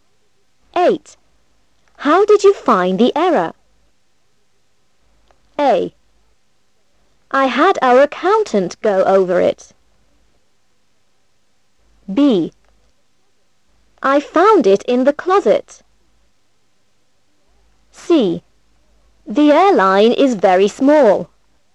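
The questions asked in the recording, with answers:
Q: How did you find the error?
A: A: I had our accountant go over it.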